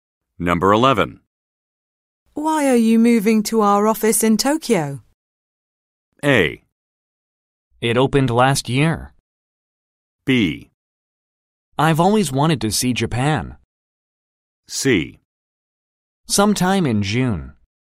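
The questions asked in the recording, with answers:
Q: Why are you moving to our office in Tokyo?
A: B: I've always wanted to see Japan.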